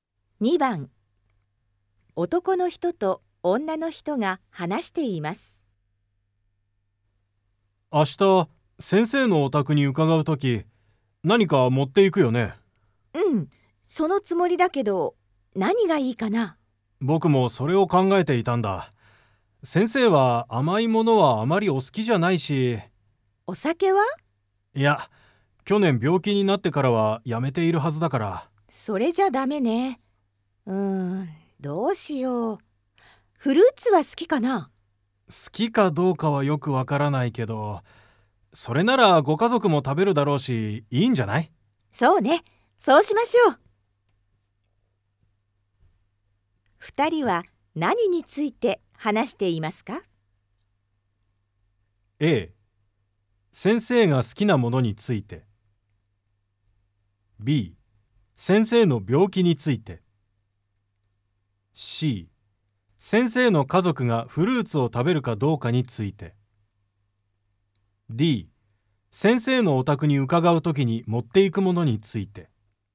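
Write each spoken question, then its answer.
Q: 二人は何について話していますか?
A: D: 先生のお宅に伺うときに持っていくものについて。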